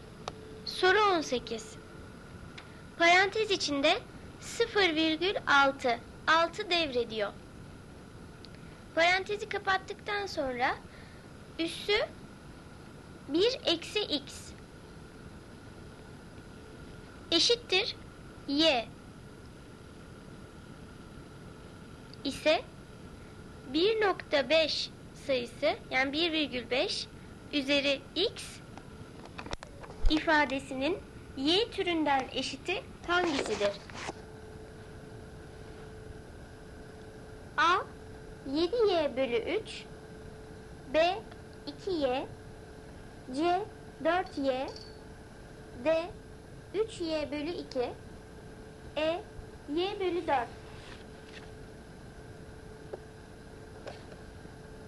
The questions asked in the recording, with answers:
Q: ise 1.5 sayısı, yani 1,5 üzeri x ifadesinin y türünden eşiti hangisidir?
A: Doğru cevap D. 3y bölü 2.